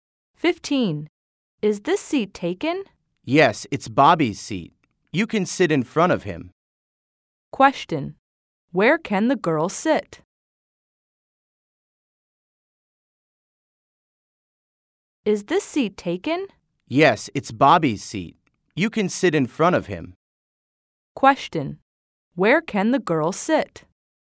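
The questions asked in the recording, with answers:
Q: Where can the girl sit?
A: In front of Bobby.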